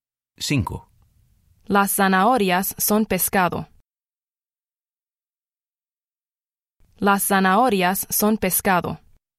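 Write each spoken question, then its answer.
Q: Las zanahorias son pescado.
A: no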